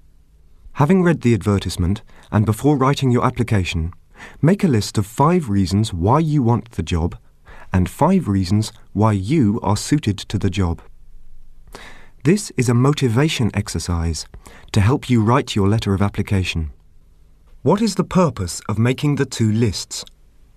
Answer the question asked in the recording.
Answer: The purpose is to help motivate oneself before writing the application.